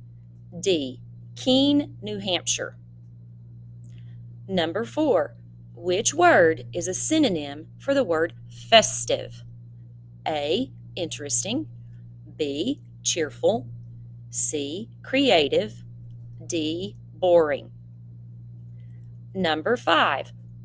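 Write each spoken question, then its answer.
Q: Which word is a synonym for the word festive?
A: B: Cheerful.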